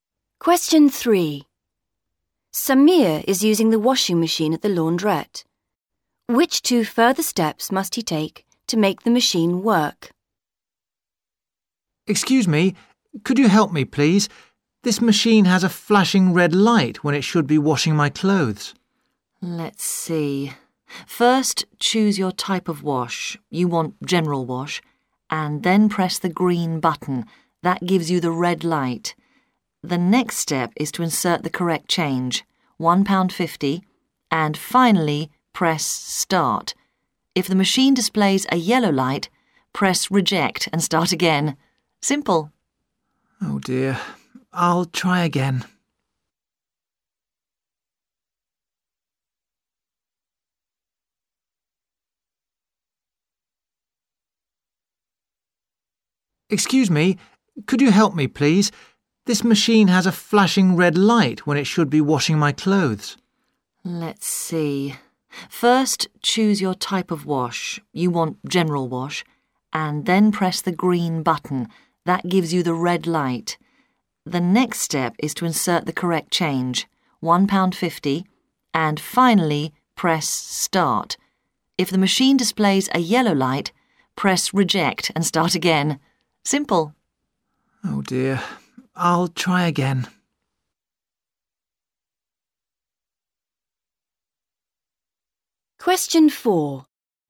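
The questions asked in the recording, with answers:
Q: Which 2 further steps must he take to make the machine work?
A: Insert the correct change (£1.50) and press start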